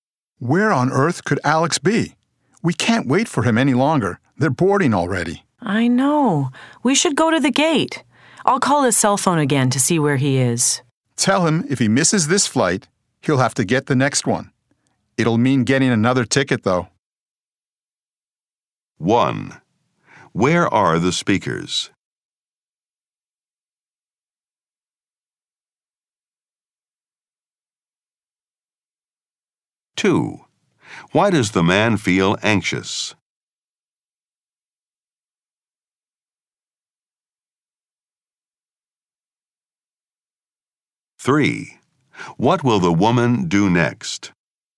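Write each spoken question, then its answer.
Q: Where are the speakers?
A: At an airport

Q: Why does the man feel anxious?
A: Alex hasn't arrived and they are boarding

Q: What will the woman do next?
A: Call Alex's cell phone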